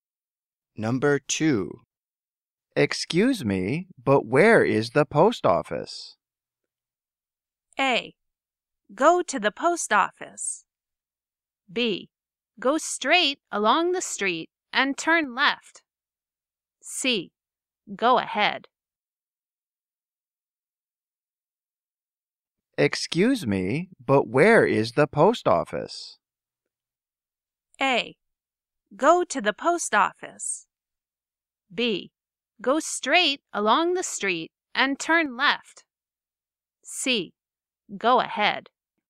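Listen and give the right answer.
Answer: B: Go straight along the street and turn left.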